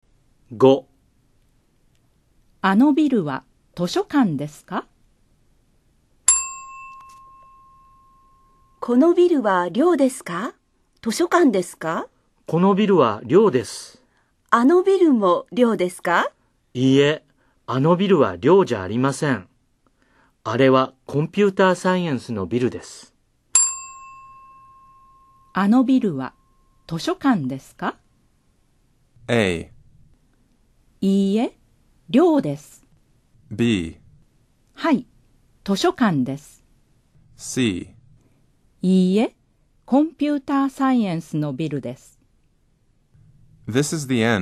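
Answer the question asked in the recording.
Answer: C: いいえ、コンピューターサイエンスのビルです。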